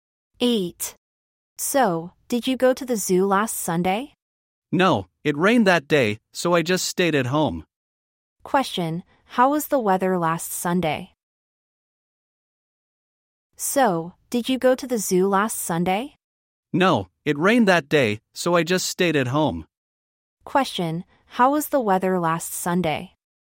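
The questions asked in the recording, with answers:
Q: Question, how was the weather last Sunday?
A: Rainy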